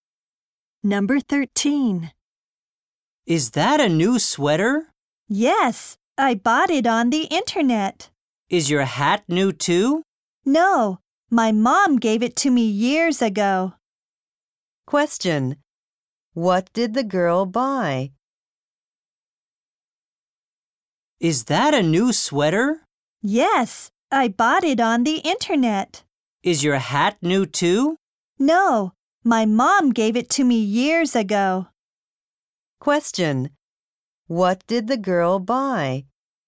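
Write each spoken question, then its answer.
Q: What did the girl buy?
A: A sweater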